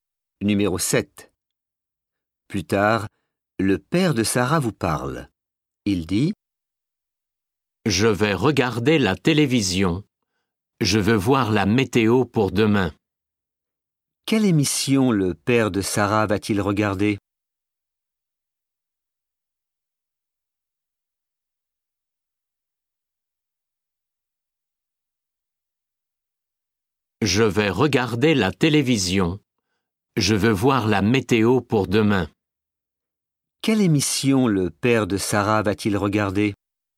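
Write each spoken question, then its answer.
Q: Quelle émission le père de Sarah va-t-il regarder?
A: La météo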